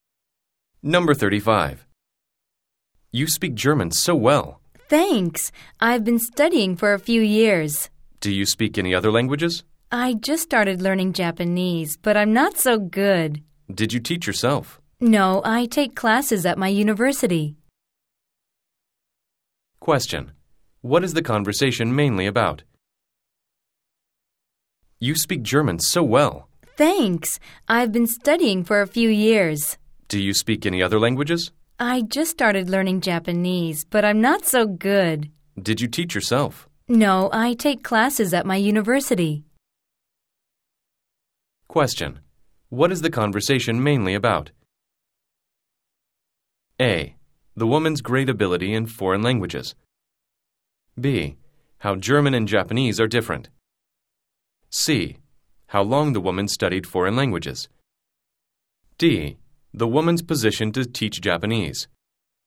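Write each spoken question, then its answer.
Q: What is the conversation mainly about?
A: A: The woman's great ability in foreign languages.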